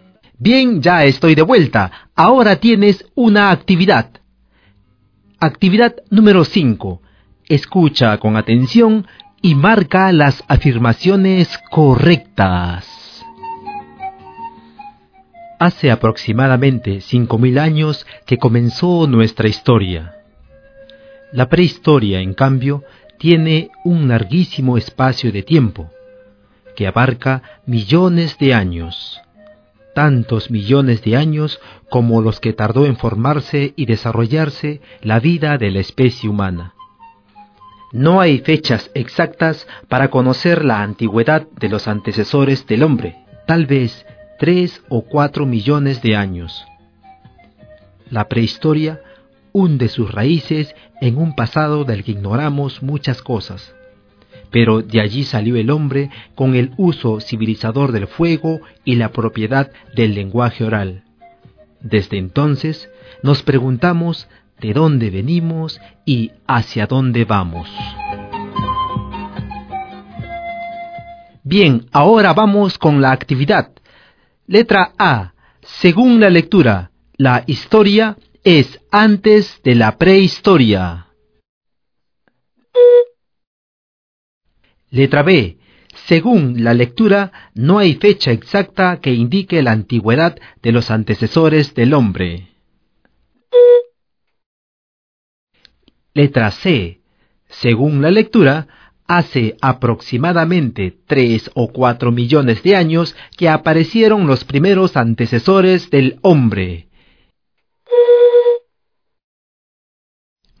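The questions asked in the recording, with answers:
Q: Según la lectura, la historia es antes de la prehistoria.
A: Incorrecta

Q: Según la lectura, no hay fecha exacta que indique la antigüedad de los antecesores del hombre.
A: Correcta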